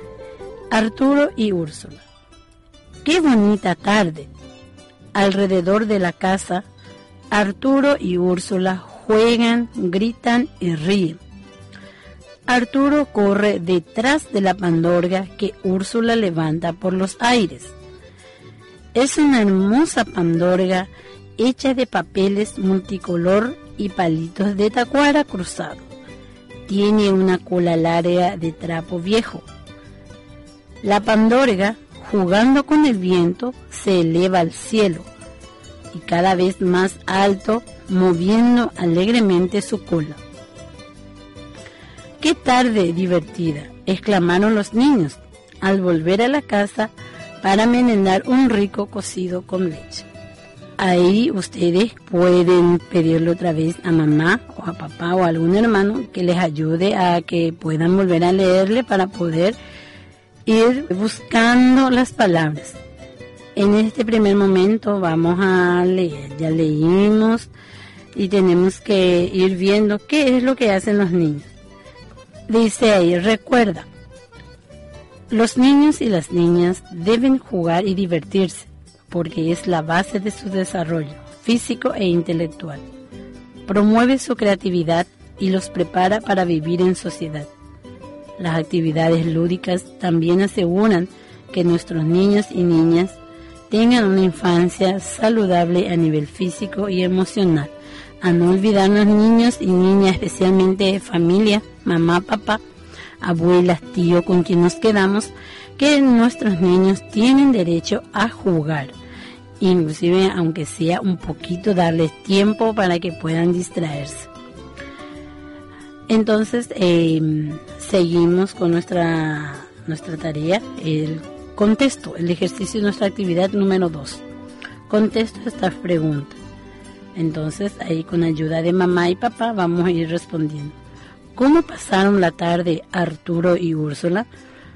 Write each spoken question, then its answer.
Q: ¿Cómo pasaron la tarde Arturo y Úrsula?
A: Pasaron una tarde divertida.